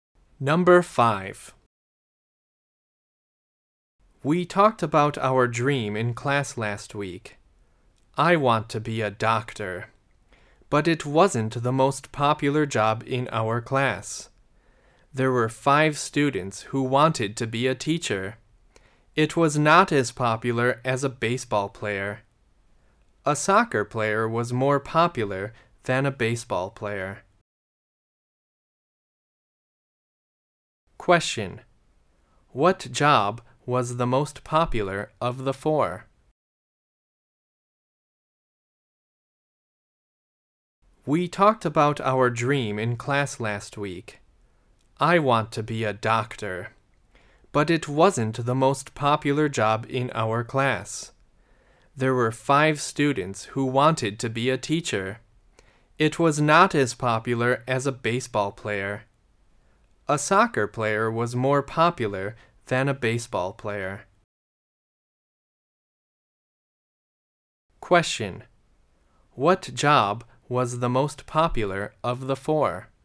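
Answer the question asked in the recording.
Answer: A soccer player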